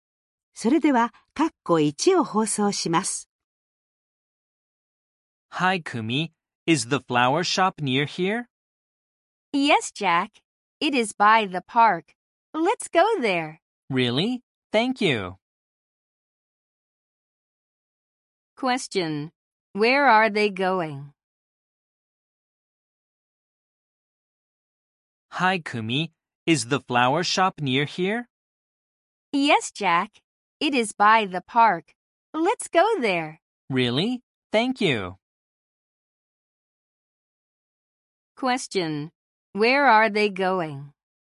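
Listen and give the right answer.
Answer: To the flower shop (by the park).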